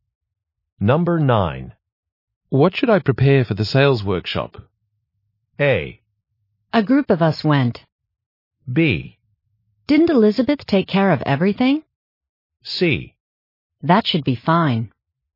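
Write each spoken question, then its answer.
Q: What should I prepare for the sales workshop?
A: B: Didn't Elizabeth take care of everything?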